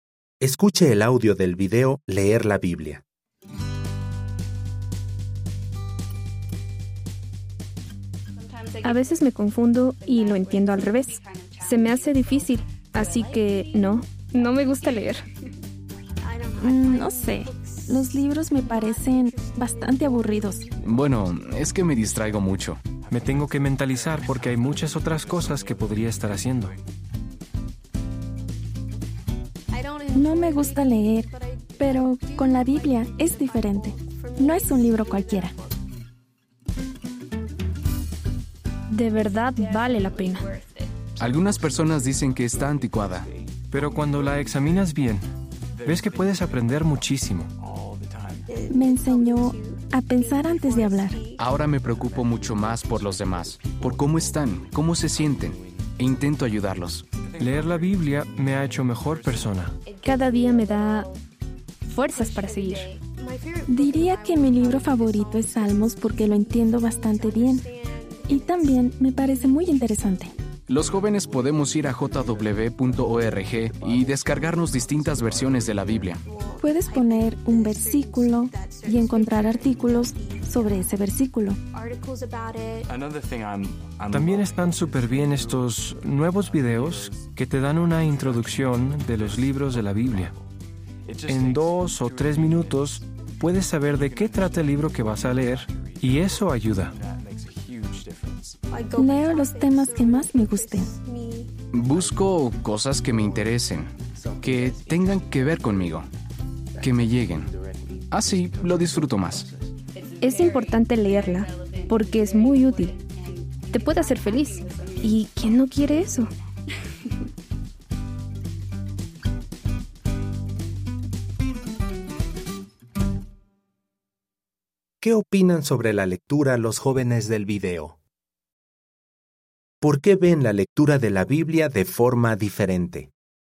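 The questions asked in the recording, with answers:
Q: ¿Qué opinan sobre la lectura los jóvenes del video?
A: No les gusta leer; les resulta difícil, aburrido y se distraen

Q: ¿Por qué ven la lectura de la Biblia de forma diferente?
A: Porque vale la pena: aprenden mucho, los hace mejores personas, les da fuerzas y los hace felices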